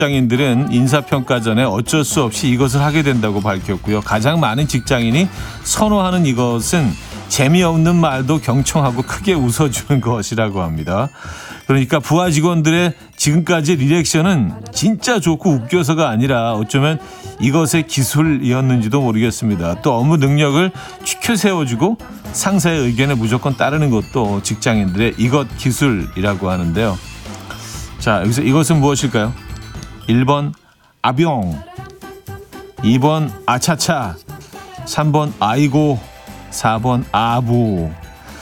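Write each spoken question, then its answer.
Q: 자, 여기서 이것은 무엇일까요? 1번 아병, 2번 아차차, 3번 아이고, 4번 아부.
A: 4: 아부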